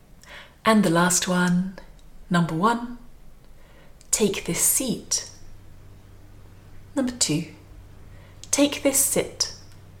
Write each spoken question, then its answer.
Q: And the last one, number one, take this seat. Number two, take this sit.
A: And the answer is number one, take this seat.